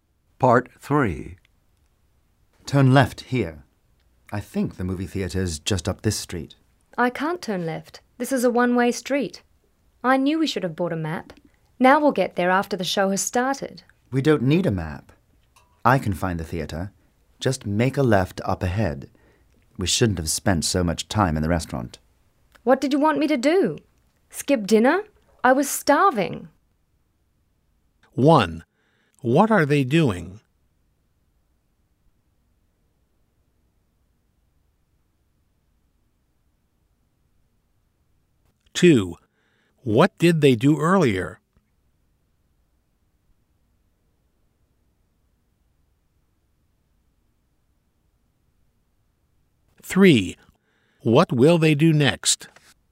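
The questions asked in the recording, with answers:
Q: What are they doing?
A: Driving to the movie theater

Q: what did they do earlier?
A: Ate dinner at a restaurant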